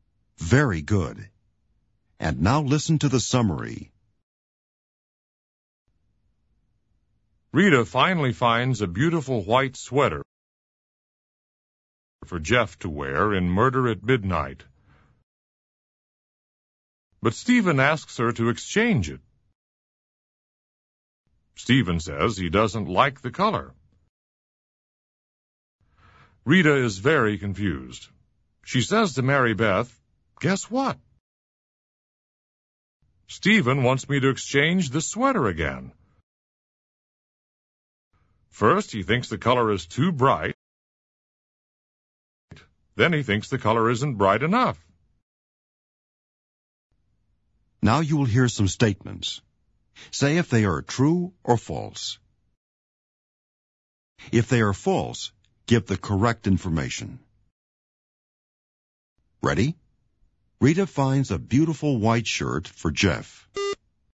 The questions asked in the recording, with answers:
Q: Rita finds a beautiful white shirt for Jeff.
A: False. Rita finds a beautiful white sweater for Jeff.